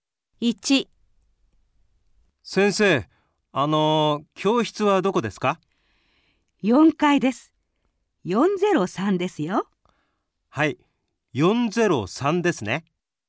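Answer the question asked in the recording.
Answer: 4階の403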